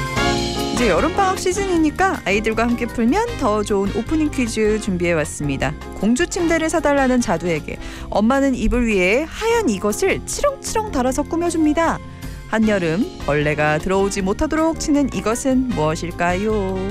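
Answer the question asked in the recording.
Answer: 모기장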